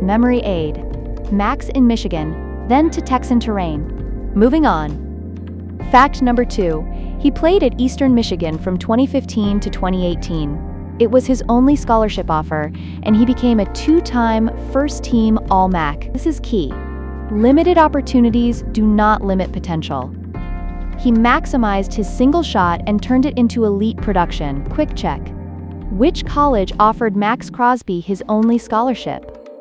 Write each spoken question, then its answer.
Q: Which college offered Max Crosby his only scholarship?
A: Correct answer. Eastern Michigan.